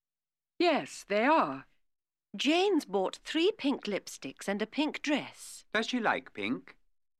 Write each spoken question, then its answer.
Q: Does she like pink?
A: Yes, she does.